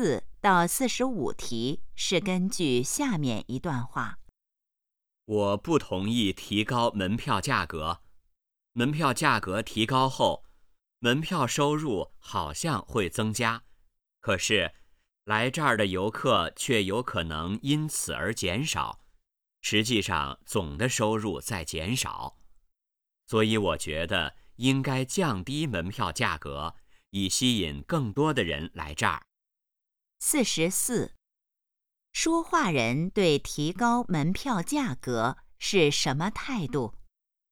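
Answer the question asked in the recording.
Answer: 反对(不同意)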